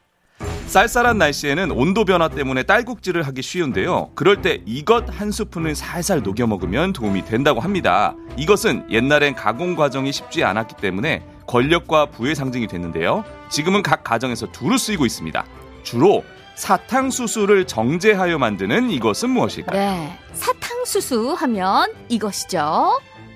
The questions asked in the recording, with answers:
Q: 주로 사탕수수를 정제하여 만드는 이것은 무엇일까요?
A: 설탕. 설탕. 설탕!